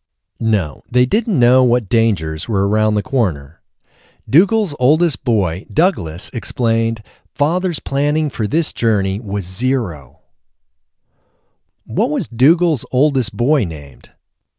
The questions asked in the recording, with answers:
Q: What was Dougal's oldest boy named?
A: Dougal's oldest boy was named Douglas.